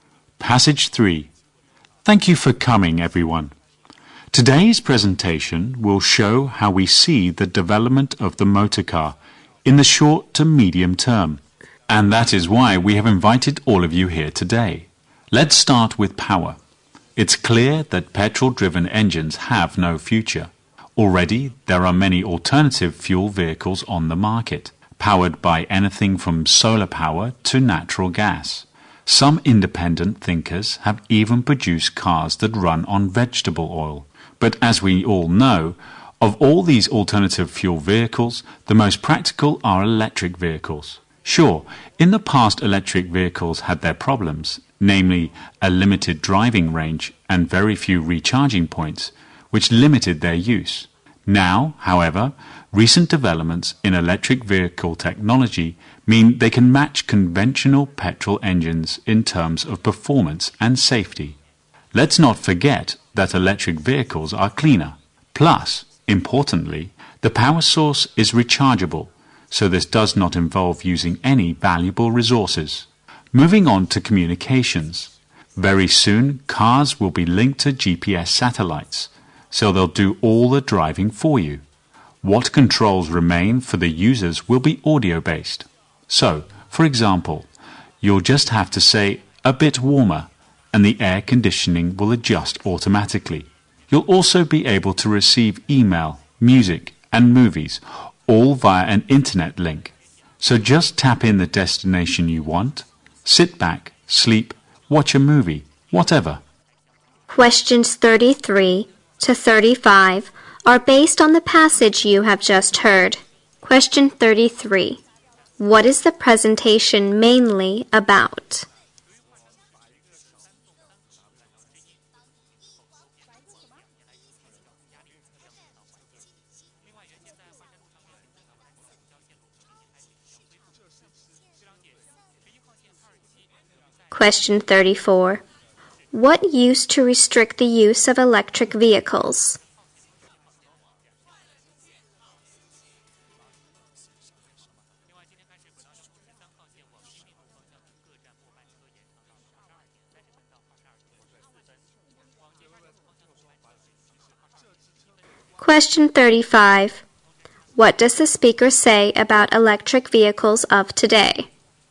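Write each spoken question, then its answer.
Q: What is the presentation mainly about?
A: How the motor car will develop in the short to medium term

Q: What used to restrict the use of electric vehicles?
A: A limited driving range and very few recharging points

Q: What does the speaker say about electric vehicles of today?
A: They can match petrol cars in performance and safety, and they are cleaner.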